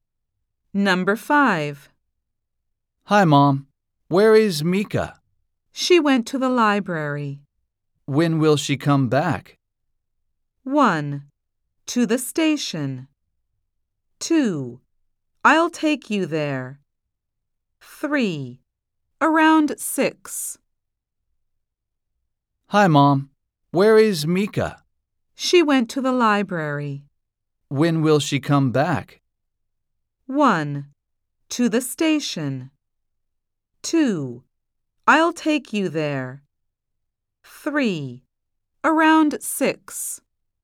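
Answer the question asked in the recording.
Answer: 3: Around 6.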